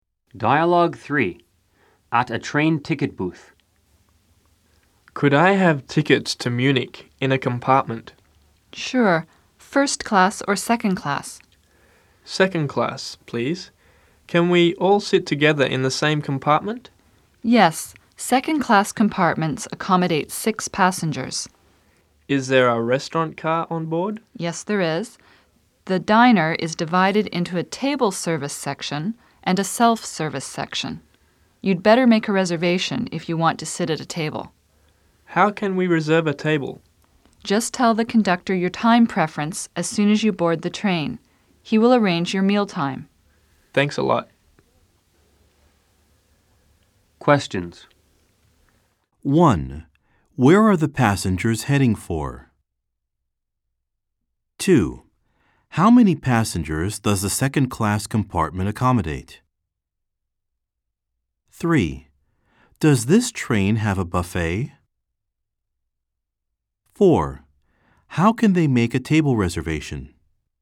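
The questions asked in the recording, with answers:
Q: Where are the passengers heading for?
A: Munich

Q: Does this train have a buffet?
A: Yes, a diner with table service and self-service sections

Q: How can they make a table reservation?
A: Tell the conductor their time preference as soon as they board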